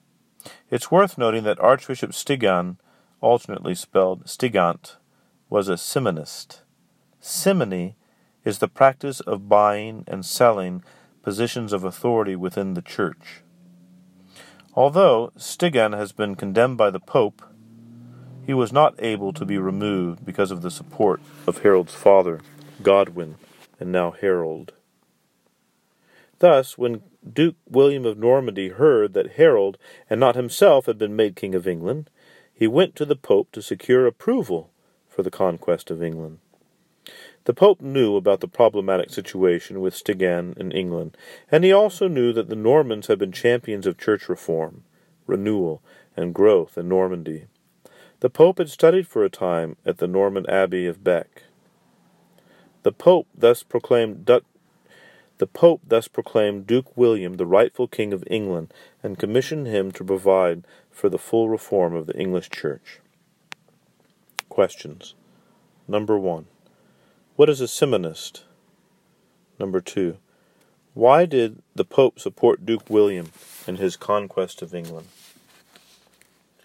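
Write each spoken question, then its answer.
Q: What is a Simonist?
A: Someone who buys and sells positions of authority within the church

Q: Why did the Pope support Duke William in his conquest of England?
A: Because of the problem with the simonist Archbishop Stigand in England and because the Normans had championed church reform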